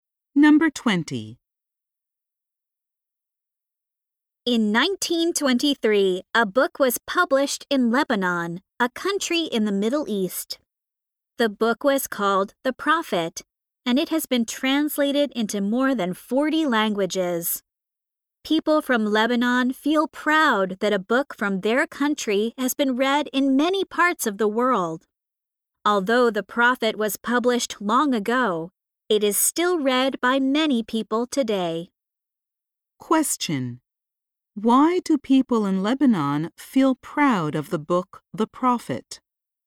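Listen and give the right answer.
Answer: Because a book from their country has been read in many parts of the world.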